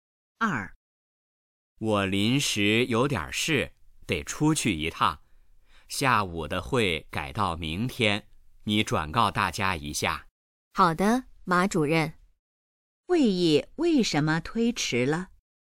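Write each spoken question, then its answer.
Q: 会议为什么推迟了?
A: 马主任临时有事要出去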